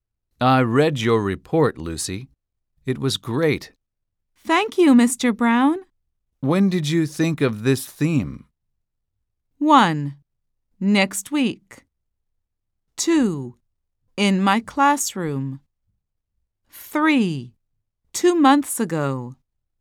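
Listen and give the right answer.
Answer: 3: 2 months ago.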